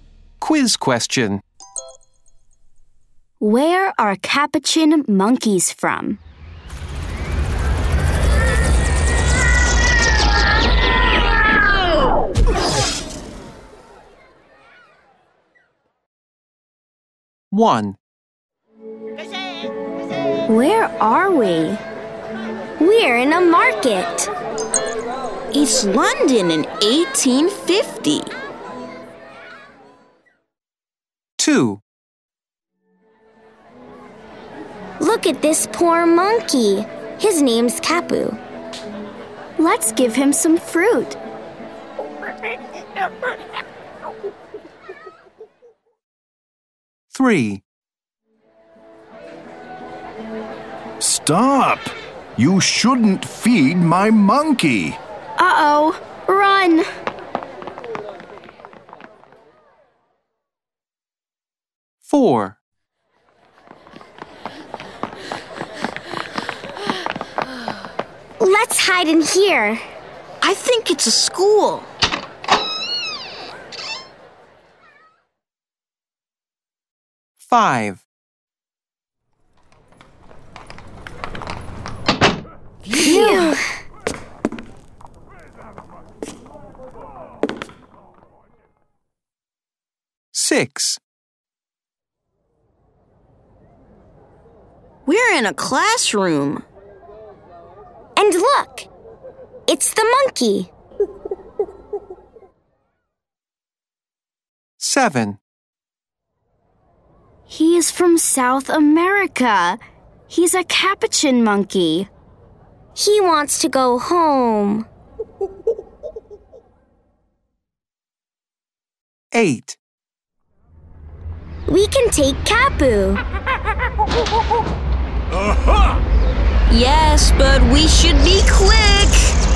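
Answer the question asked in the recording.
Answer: South America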